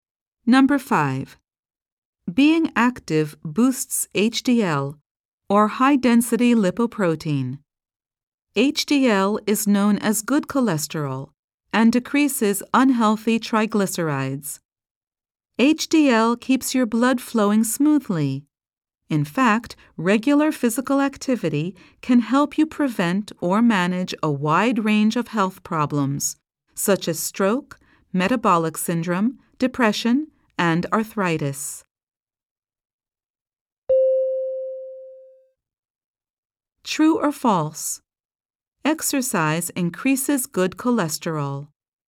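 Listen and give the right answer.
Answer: True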